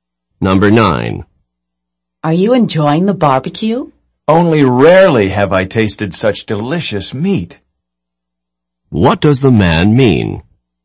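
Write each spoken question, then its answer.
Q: What does the man mean?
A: He is enjoying it; the meat is exceptionally delicious.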